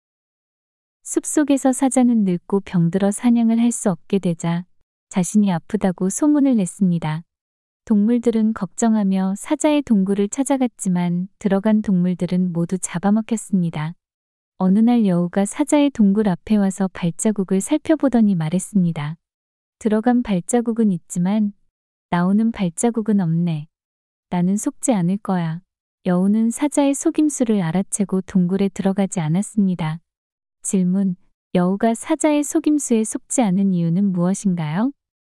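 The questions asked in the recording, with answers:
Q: 여우가 사자의 속임수에 속지 않은 이유는 무엇인가요?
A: 동굴로 들어간 발자국만 있고 나오는 발자국이 없었기 때문에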